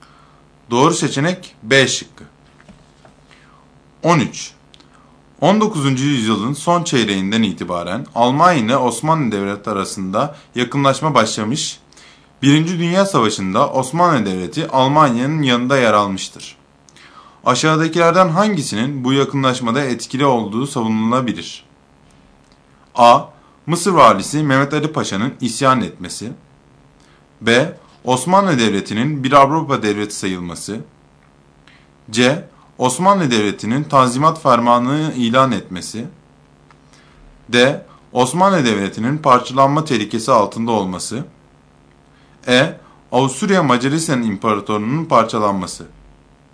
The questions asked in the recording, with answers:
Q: Aşağıdakilerden hangisinin bu yakınlaşmada etkili olduğu savunulabilir?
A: Doğru seçenek D şıkkı.